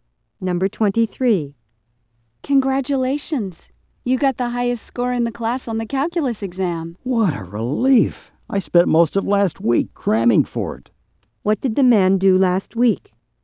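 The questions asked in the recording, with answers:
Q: What did the man do last week?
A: He studied hard (crammed) for the calculus exam.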